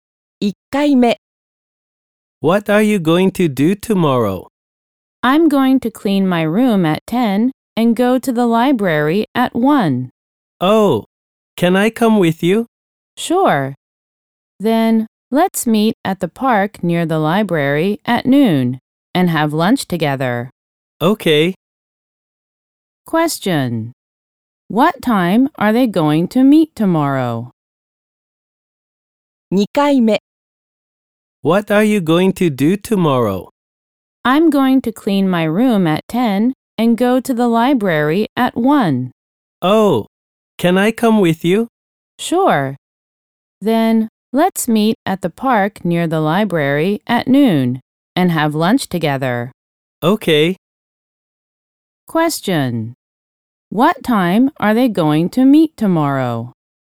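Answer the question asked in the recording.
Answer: At noon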